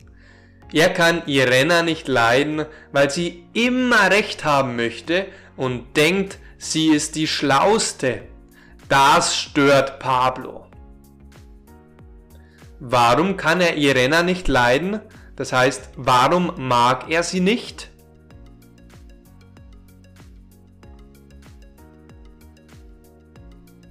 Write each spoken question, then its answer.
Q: Warum kann er Irena nicht leiden?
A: Er mag sie nicht, weil sie immer recht haben möchte und denkt, sie ist die Schlauste.